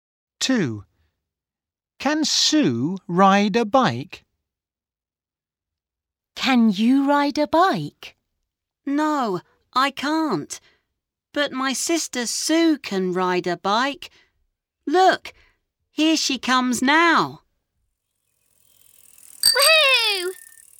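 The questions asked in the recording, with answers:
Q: Can Sue ride a bike?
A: Yes, she can.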